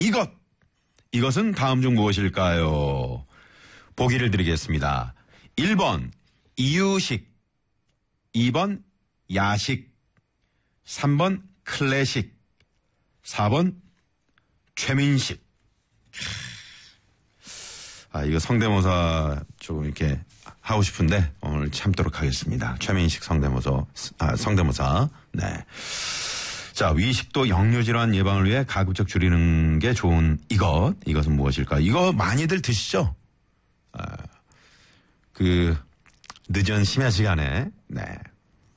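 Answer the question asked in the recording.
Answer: 2: 야식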